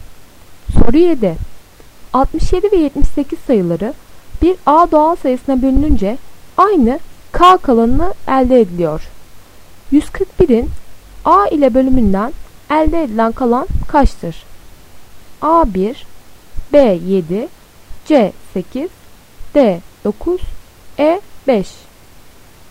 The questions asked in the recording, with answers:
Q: 141'in A ile bölümünden elde edilen kalan kaçtır?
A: D. 9.